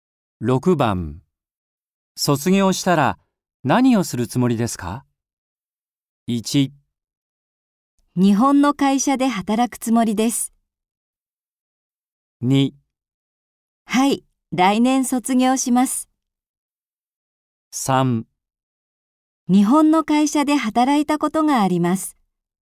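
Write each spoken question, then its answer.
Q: 卒業したら何をするつもりですか?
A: 1: 日本の会社で働くつもりです。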